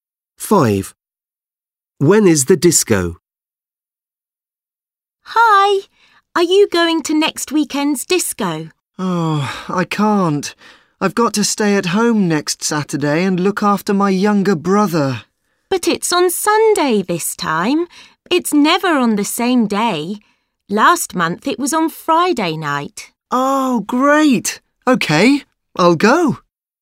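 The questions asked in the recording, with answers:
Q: When is the disco?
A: On Sunday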